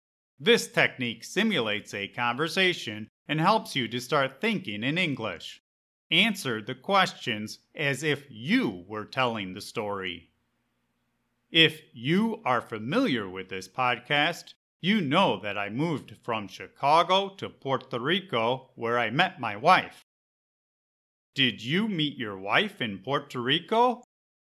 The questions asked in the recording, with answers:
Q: Did you meet your wife in Puerto Rico?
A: Yep. I met my wife shortly after I moved to Puerto Rico.